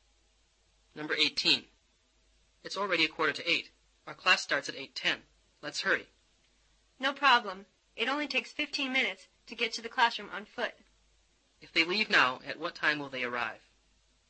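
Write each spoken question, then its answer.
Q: If they leave now, at what time will they arrive?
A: 8:00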